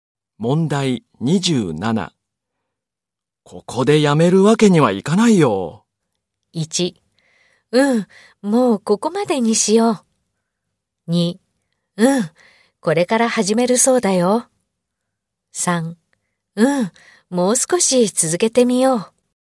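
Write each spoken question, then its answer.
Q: ここでやめるわけにはいかないよ。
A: 2: うん、もう少し続けてみよう。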